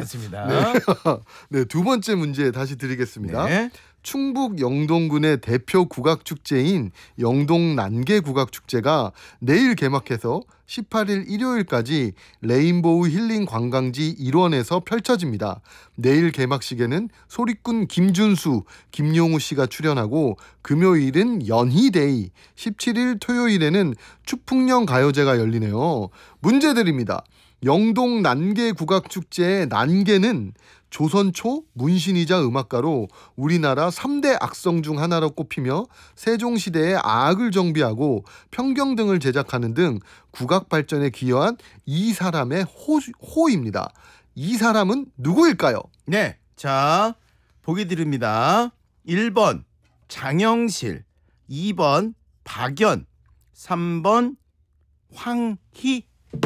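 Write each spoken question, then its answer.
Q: 이 사람은 누구일까요?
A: 2번: 박연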